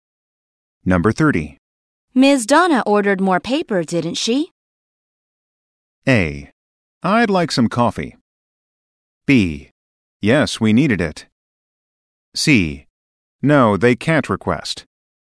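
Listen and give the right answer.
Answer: B: Yes, we needed it.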